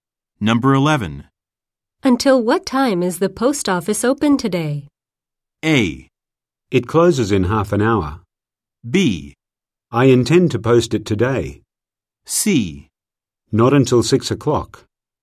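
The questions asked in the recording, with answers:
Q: Until what time is the post office open today?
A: A: It closes in half an hour.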